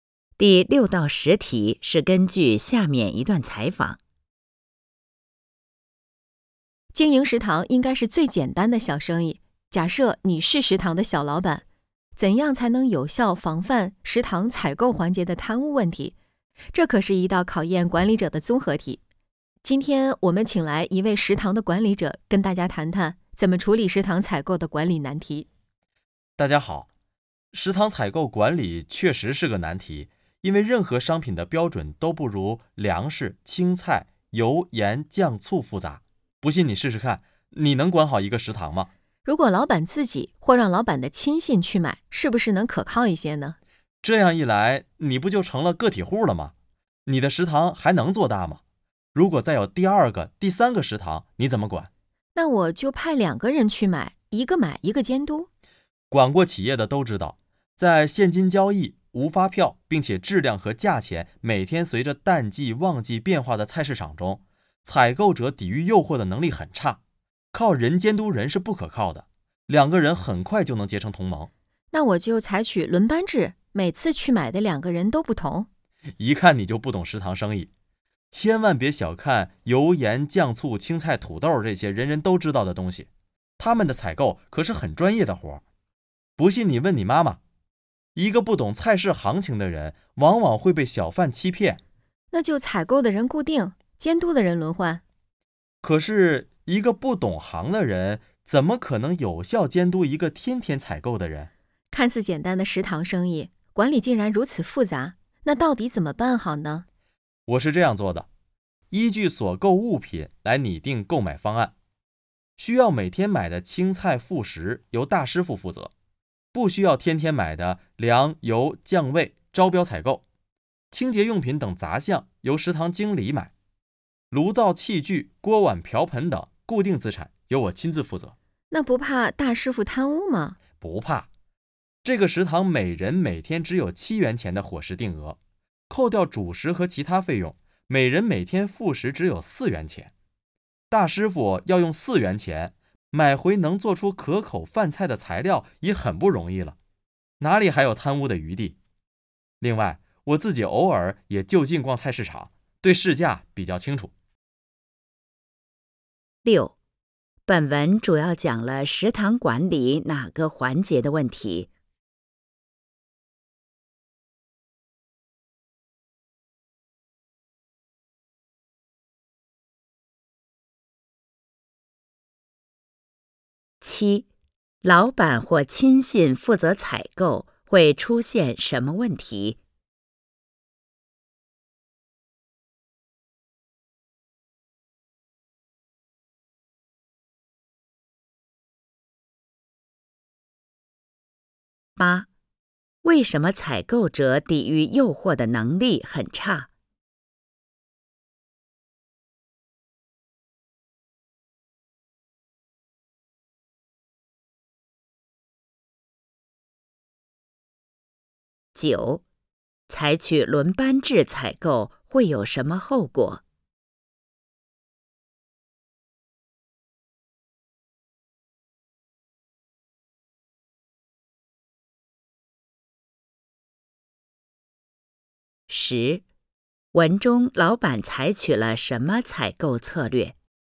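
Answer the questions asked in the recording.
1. 采购环节
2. 食堂做不大,有多个食堂时管不过来
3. 现金交易、无发票,质量和价钱每天随淡季旺季变化
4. 不懂菜市行情的人容易被小贩欺骗
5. 根据所购物品拟定购买方案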